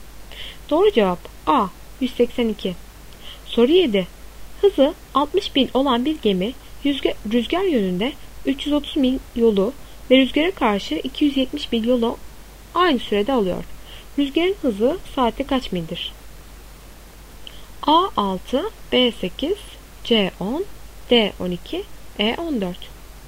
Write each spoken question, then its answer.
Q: Rüzgarın hızı saatte kaç mildir?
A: Doğru cevap A 6.